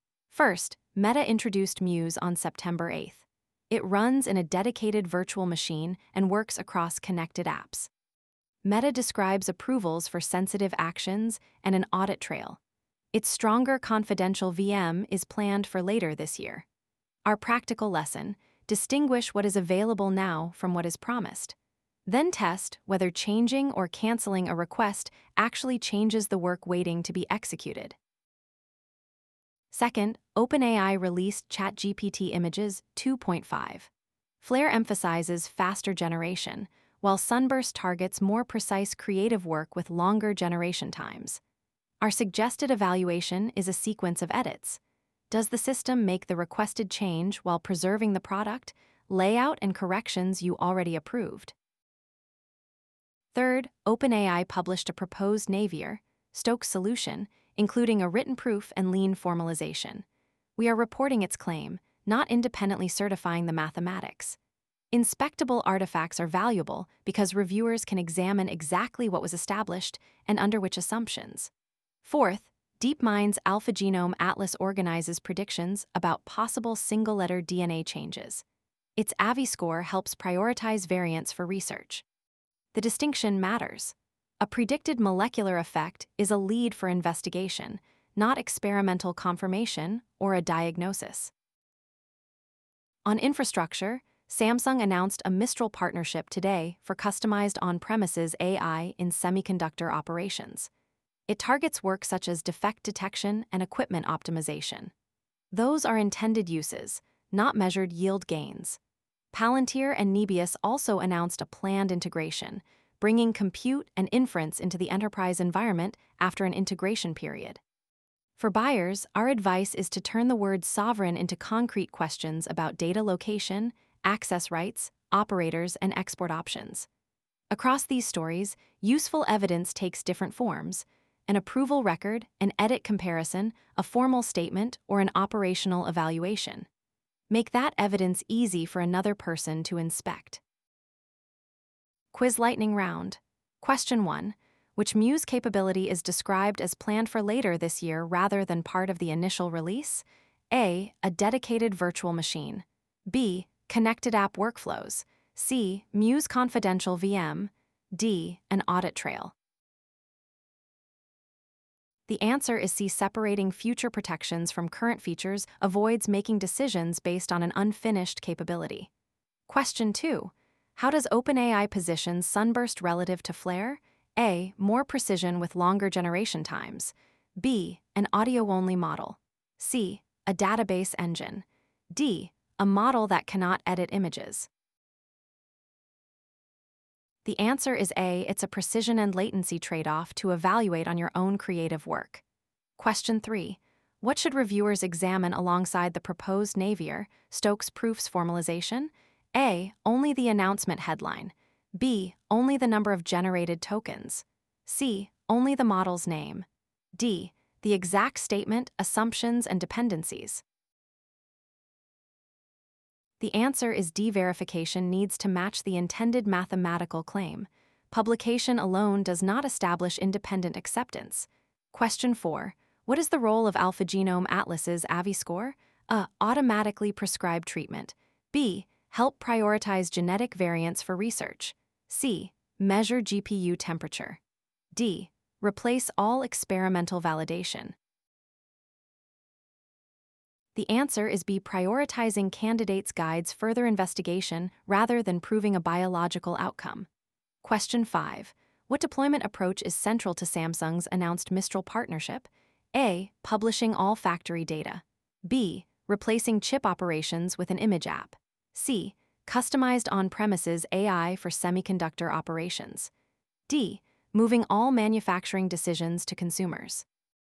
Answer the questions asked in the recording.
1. The answer is C.
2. The answer is A.
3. The answer is D.
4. The answer is B.
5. The answer is C.